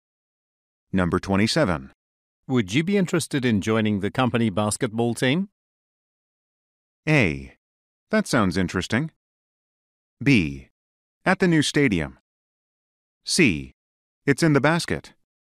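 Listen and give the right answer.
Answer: A: That sounds interesting.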